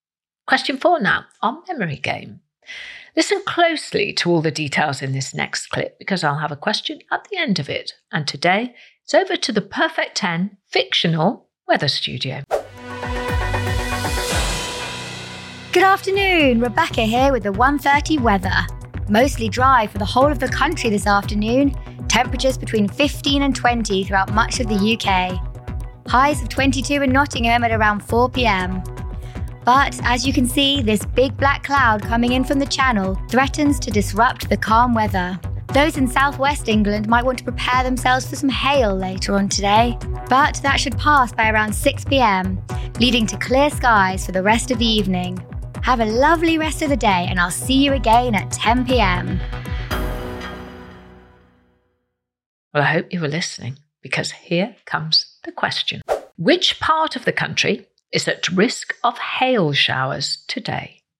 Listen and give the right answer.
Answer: The answer was the southwest of England.